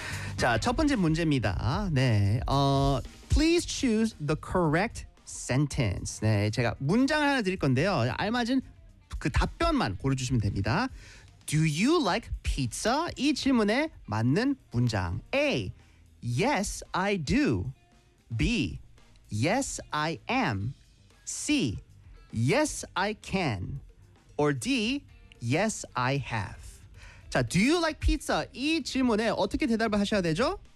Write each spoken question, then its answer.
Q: Do you like pizza? 이 질문에 맞는 문장.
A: Yes, I do. 맞습니다.